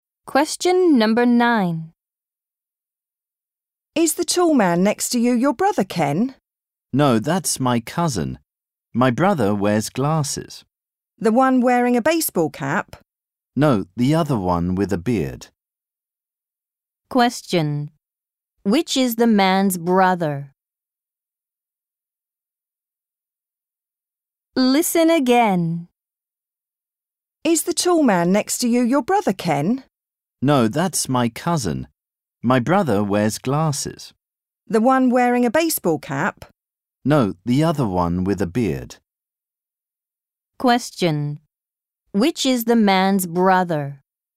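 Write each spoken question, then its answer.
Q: Which is the man's brother?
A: The one who wears glasses and has a beard (not the baseball cap)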